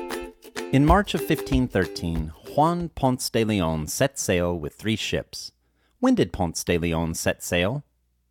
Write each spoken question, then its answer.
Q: When did Ponce de Leon set sail?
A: Ponce de Leon set sail in March of 1513.